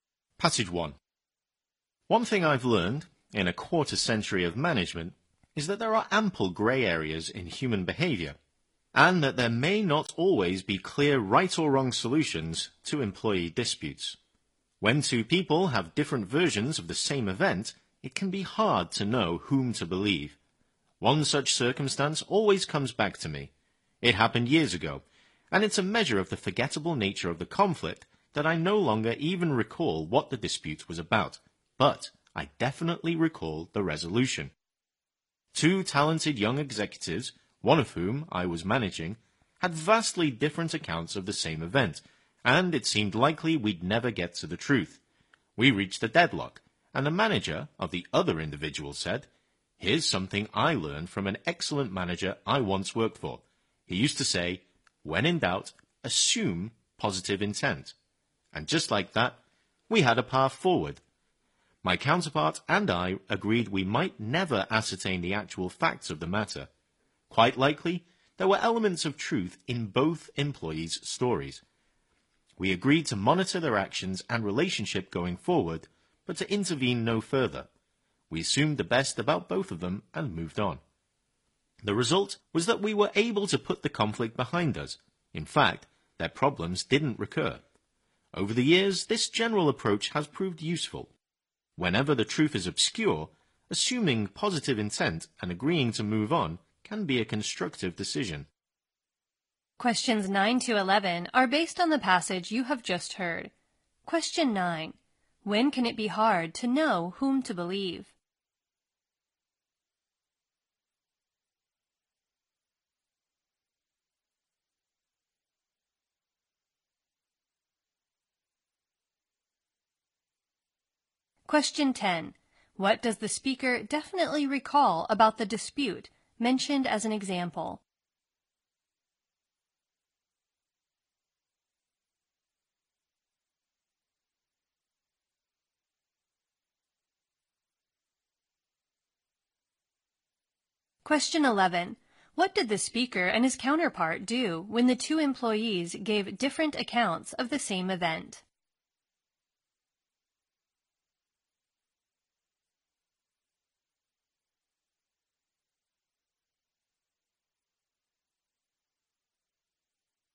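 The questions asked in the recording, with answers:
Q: When can it be hard to know whom to believe?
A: When two people have different versions of the same event

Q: What does the speaker definitely recall about the dispute mentioned as an example?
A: The resolution

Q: What did the speaker and his counterpart do when the two employees gave different accounts of the same event?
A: They assumed positive intent, agreed to monitor them without intervening further, and moved on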